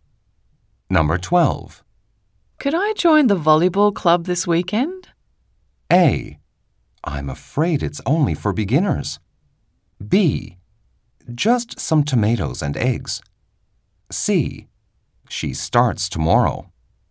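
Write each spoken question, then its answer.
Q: Could I join the volleyball club this weekend?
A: A: I'm afraid it's only for beginners.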